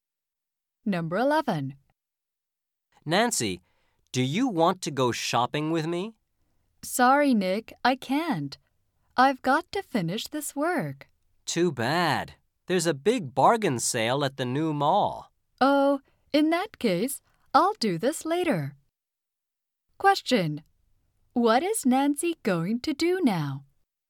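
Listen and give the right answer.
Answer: Go shopping with Nick at the sale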